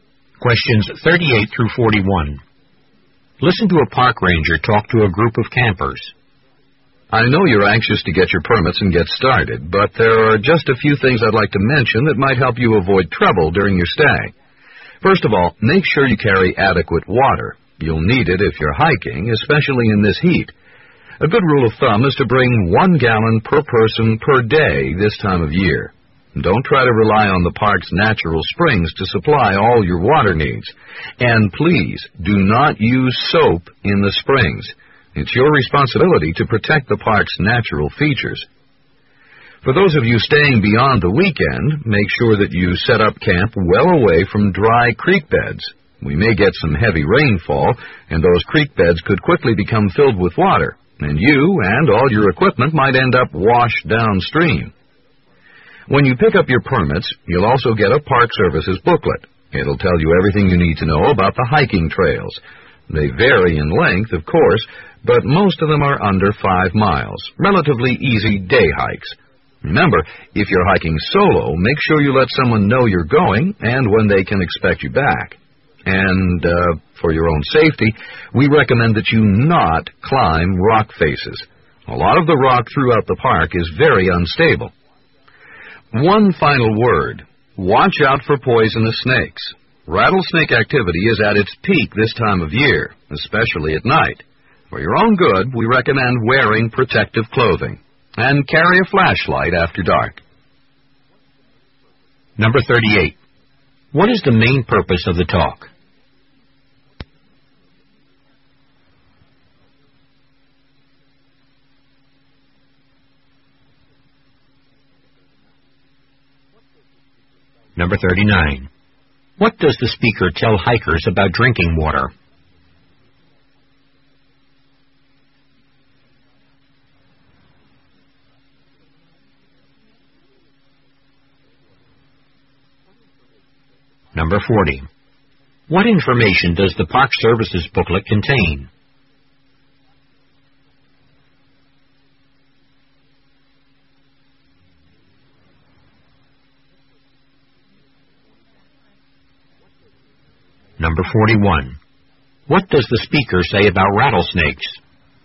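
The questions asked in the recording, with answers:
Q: What is the main purpose of the talk?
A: To give campers safety advice for their stay in the park

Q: What does the speaker tell hikers about drinking water?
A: Bring 1 gallon per person per day; don't rely on the park's springs

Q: What information does the Park Service's booklet contain?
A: Information about the hiking trails

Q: What does the speaker say about rattlesnakes?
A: They are most active at this time of year, especially at night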